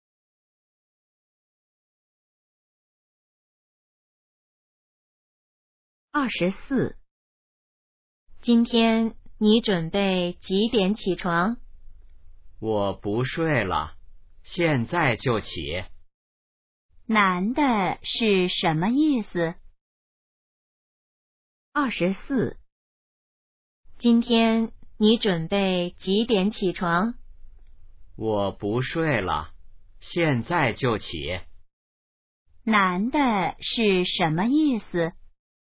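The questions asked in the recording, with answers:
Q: 男的是什么意思?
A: 他现在就起床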